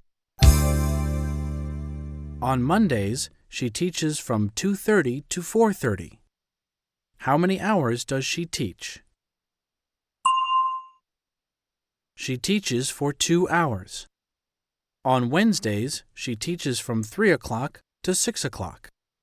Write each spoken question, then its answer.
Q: How many hours does she teach?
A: She teaches for 3 hours.